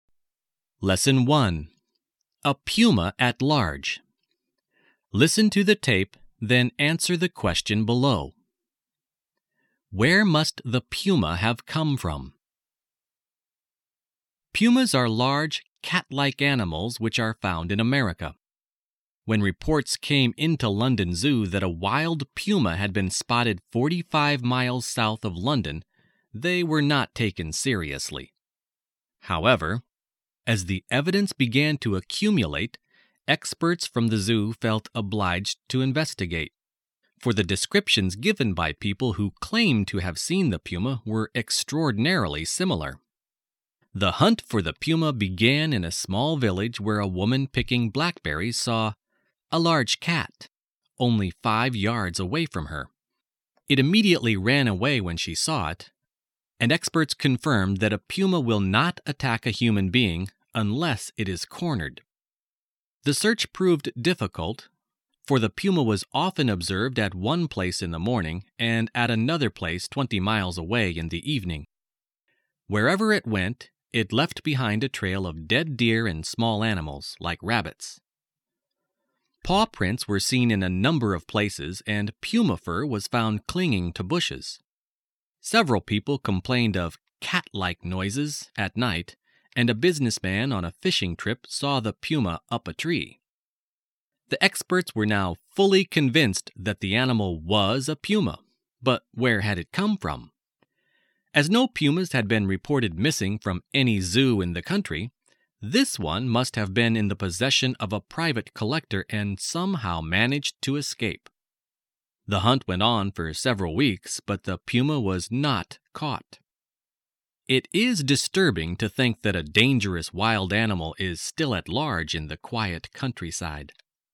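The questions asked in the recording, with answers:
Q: Where must the puma have come from?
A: From a private collector, from whom it somehow escaped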